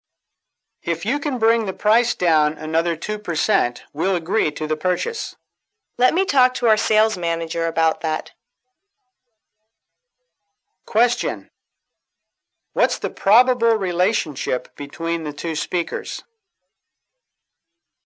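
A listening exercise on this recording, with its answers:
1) What's the probable relationship between the two speakers?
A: Salesman and customer.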